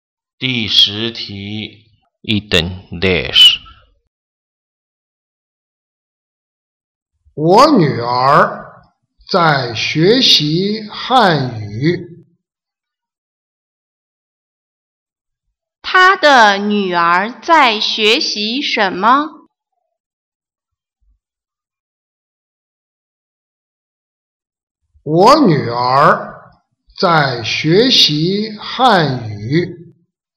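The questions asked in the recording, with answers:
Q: 她的女儿在学习什么?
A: 汉语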